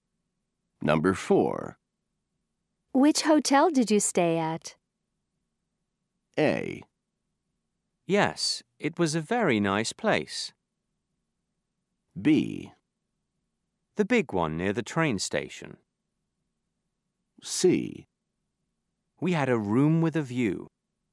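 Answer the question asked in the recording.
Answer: B: The big one near the train station.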